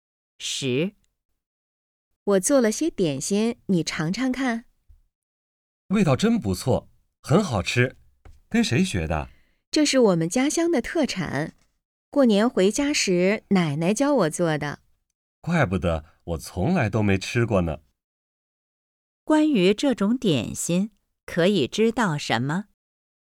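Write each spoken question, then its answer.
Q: 关于这种点心,可以知道什么?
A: 是女的家乡特产,跟奶奶学的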